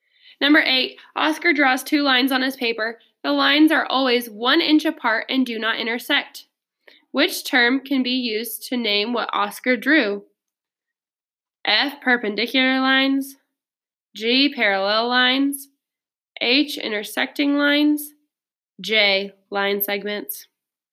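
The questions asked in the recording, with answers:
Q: Which term can be used to name what Oscar drew?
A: G: parallel lines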